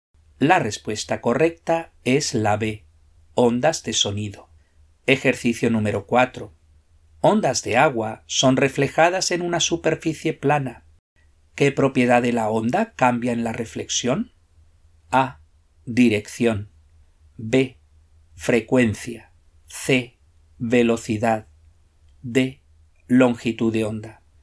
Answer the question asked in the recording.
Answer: La respuesta correcta es la A, dirección.